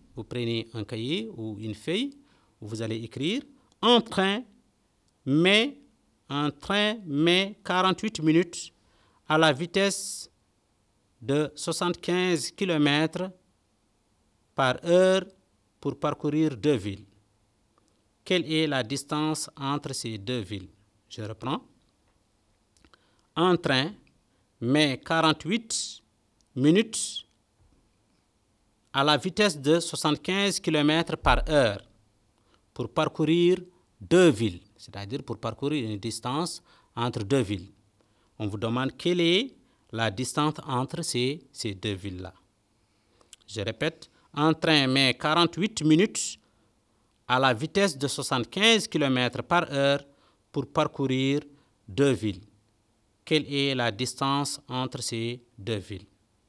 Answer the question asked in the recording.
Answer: Nous aurons égal à 60 km.